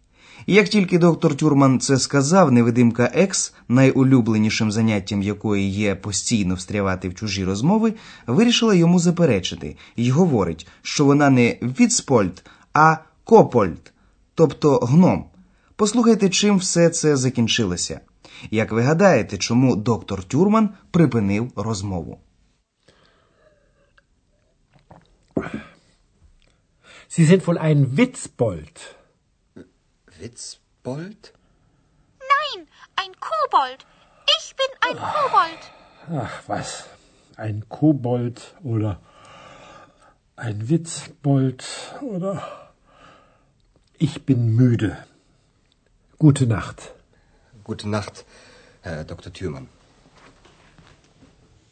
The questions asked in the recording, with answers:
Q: Як ви гадаєте, чому доктор Тюрман припинив розмову?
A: Отож, доктор Тюрман припинив розмову, оскільки він був müde, втомлений.